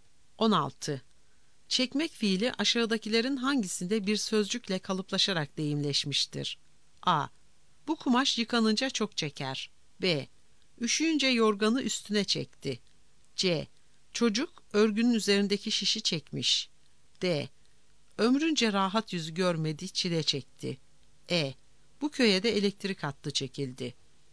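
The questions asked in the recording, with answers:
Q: Çekmek fiili aşağıdakilerin hangisinde bir sözcükle kalıplaşarak deyimleşmiştir?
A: D: Ömrünce rahat yüzü görmedi, çile çekti.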